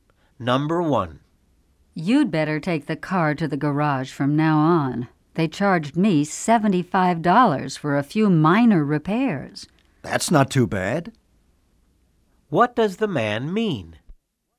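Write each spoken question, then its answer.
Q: What does the man mean?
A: $75 is a reasonable price for the repairs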